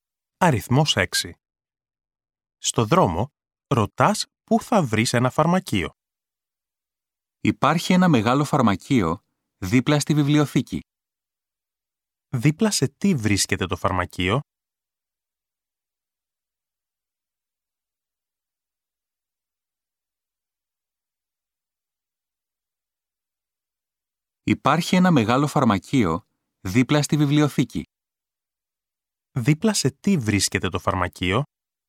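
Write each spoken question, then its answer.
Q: Δίπλα σε τι βρίσκεται το φαρμακείο?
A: Δίπλα στη βιβλιοθήκη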